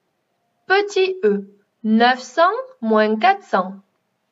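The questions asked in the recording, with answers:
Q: Petit E, 900 moins 400.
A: 500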